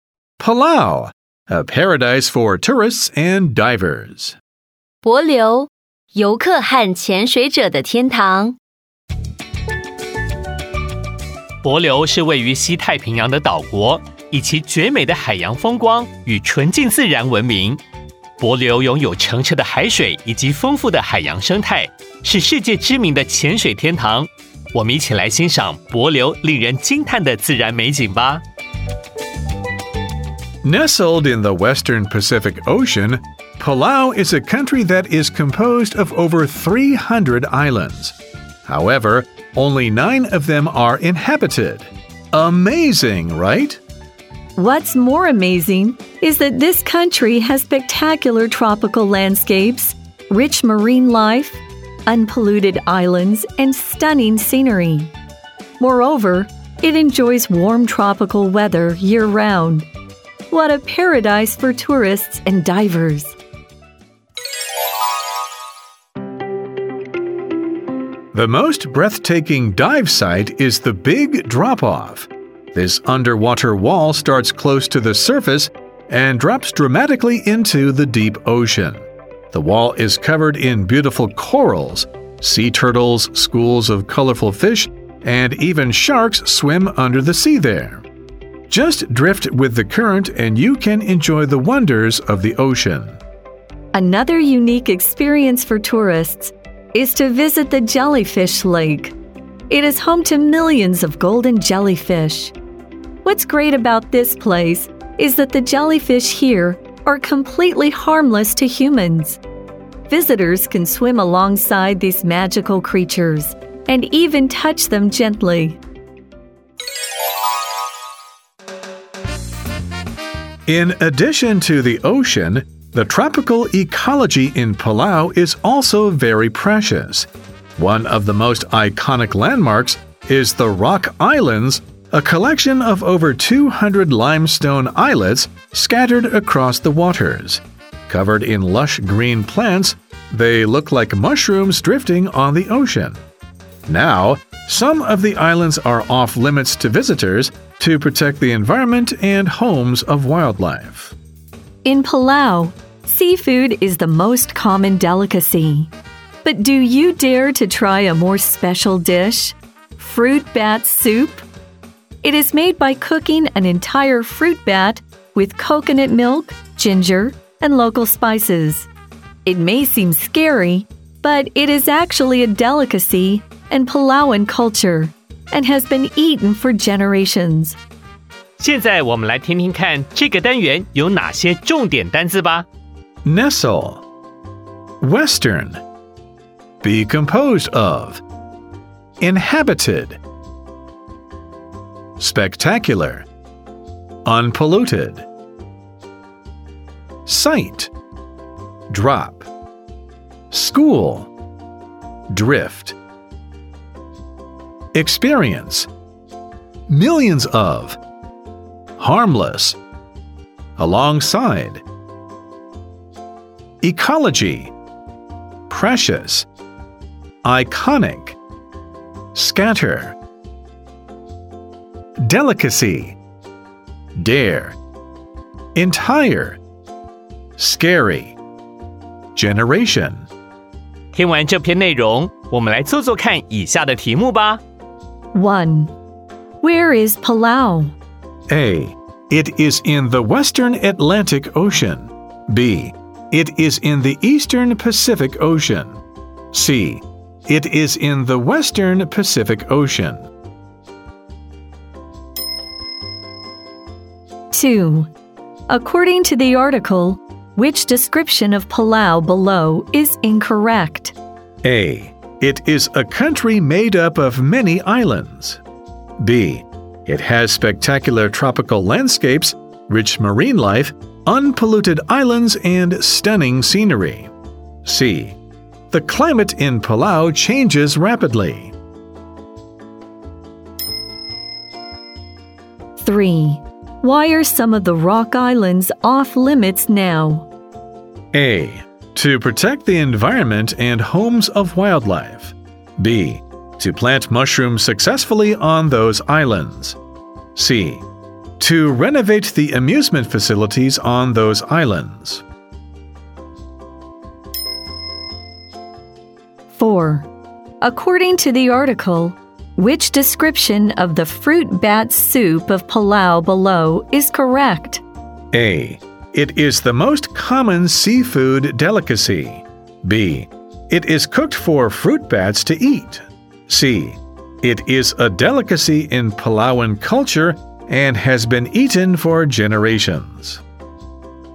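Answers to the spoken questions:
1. C: It is in the Western Pacific Ocean.
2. C: The climate in Palau changes rapidly.
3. A: To protect the environment and homes of wildlife.
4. C: It is a delicacy in Palauan culture and has been eaten for generations.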